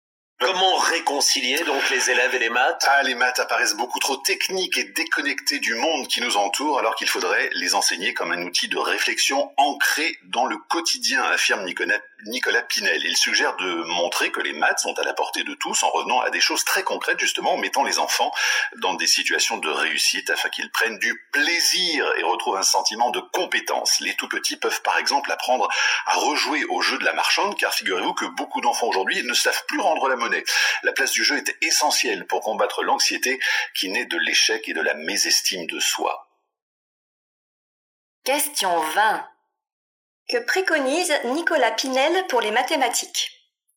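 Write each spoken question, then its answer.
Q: Que préconise Nicolas Pinel pour les mathématiques ?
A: Les enseigner de façon concrète, ancrée dans le quotidien, en mettant les enfants en situation de réussite (par exemple par le jeu)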